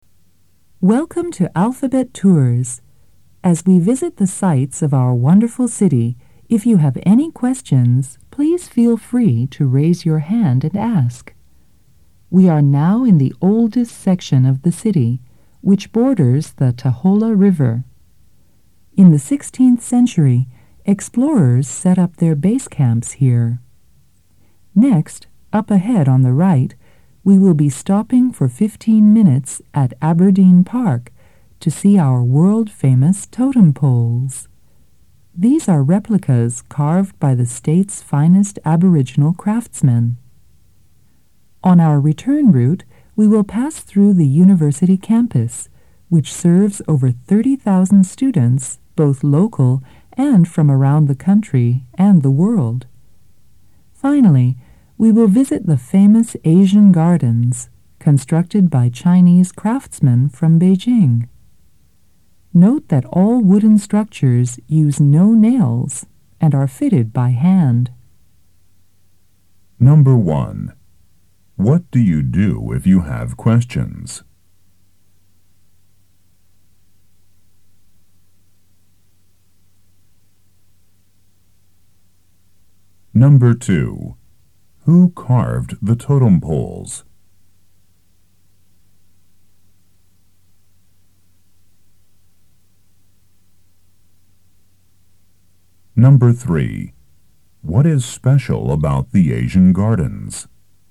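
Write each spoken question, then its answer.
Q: What do you do if you have questions?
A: Raise your hand and ask

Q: Who carved the totem poles?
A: The state's finest Aboriginal craftsmen

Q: What is special about the Asian gardens?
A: The wooden structures use no nails and are fitted by hand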